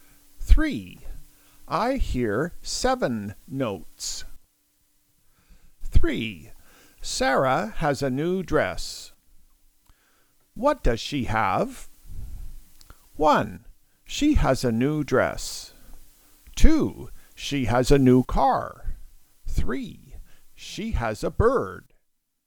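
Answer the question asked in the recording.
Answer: 1: She has a new dress.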